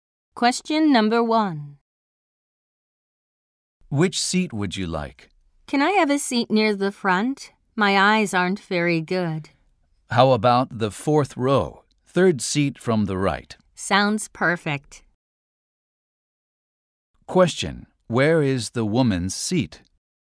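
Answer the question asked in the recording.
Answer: Fourth row, third seat from the right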